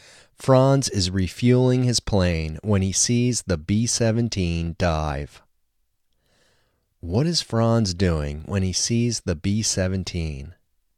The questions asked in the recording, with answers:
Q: What is Franz doing when he sees the B-17?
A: Franz is refueling the plane when he sees the B-17.